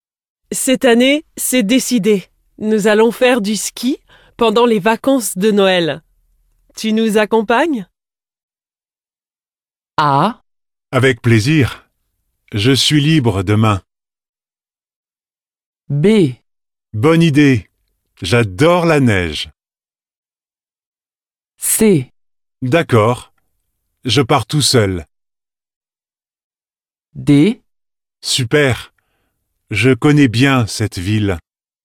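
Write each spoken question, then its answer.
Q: Tu nous accompagnes?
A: B: Bonne idée. J'adore la neige.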